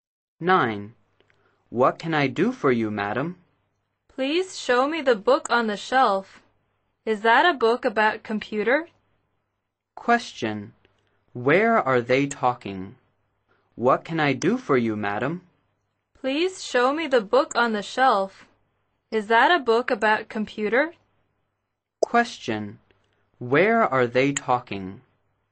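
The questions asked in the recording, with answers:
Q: Where are they talking?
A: In a bookstore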